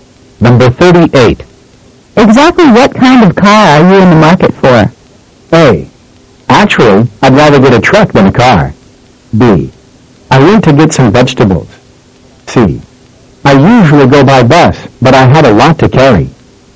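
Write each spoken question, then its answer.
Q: Exactly what kind of car are you in the market for?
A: A: Actually, I'd rather get a truck than a car.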